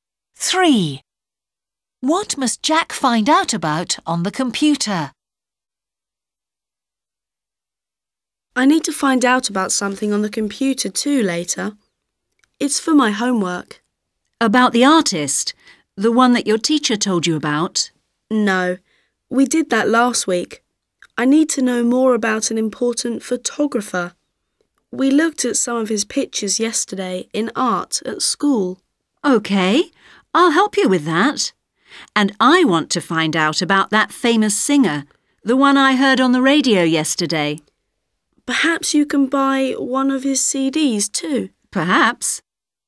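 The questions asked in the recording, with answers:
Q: What must Jack find out about on the computer?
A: an important photographer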